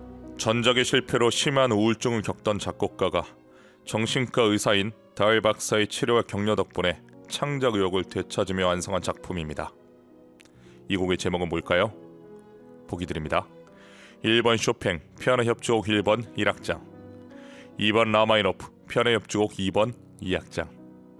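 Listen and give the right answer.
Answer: 2: 라마이노프, 피아노 협주곡 2번 2악장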